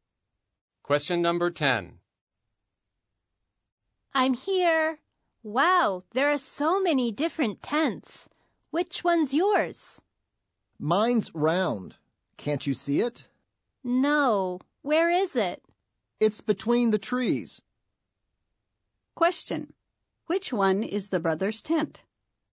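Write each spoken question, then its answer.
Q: Which one is the brother's tent?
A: The round tent between the trees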